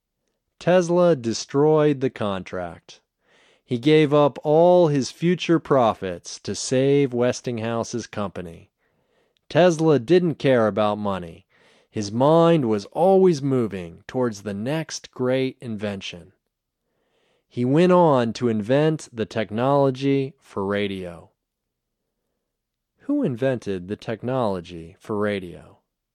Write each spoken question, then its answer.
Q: Who invented the technology for radio?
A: Tesla invented the technology for radio.